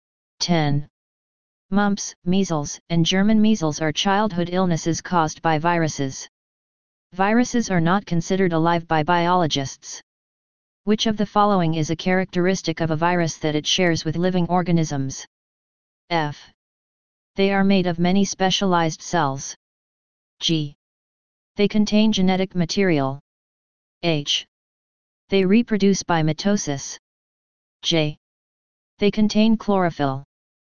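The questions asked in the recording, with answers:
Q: Which of the following is a characteristic of a virus that it shares with living organisms?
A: G: They contain genetic material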